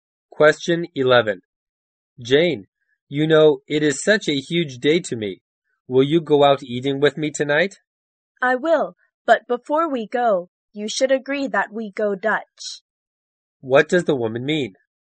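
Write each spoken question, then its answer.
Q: What does the woman mean?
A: She will go if each of them pays their own share (goes Dutch).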